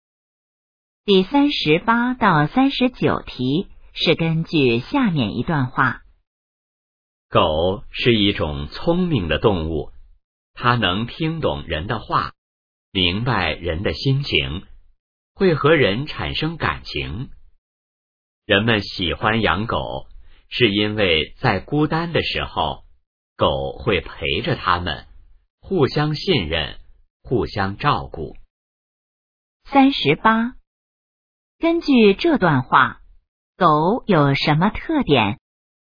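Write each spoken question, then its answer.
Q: 根据这段话,狗有什么特点?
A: 很聪明,能听懂人的话,明白人的心情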